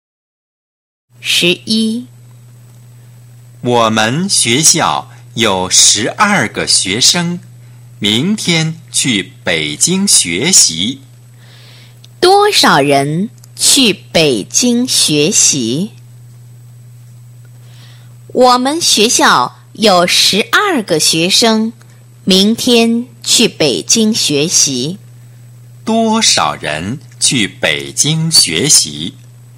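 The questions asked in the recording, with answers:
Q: 多少人去北京学习?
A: 十二个学生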